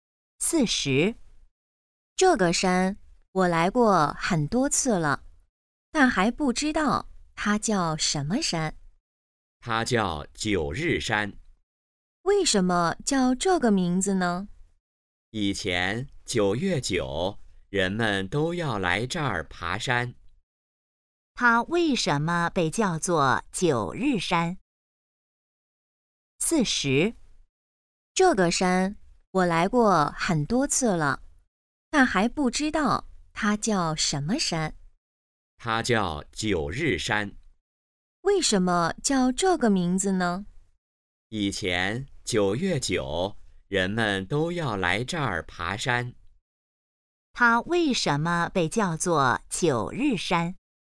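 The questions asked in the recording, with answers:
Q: 它为什么被叫做九日山?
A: 以前9月9日人们都来这儿爬山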